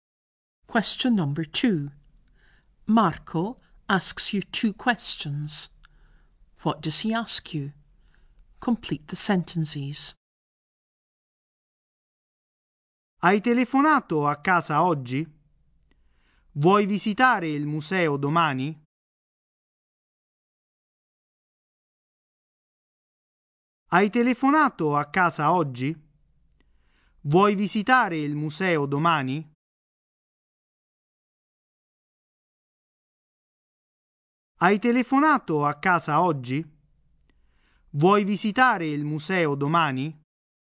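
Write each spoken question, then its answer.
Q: What does he ask you? Complete the sentences.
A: Whether you phoned home today and whether you want to visit the museum tomorrow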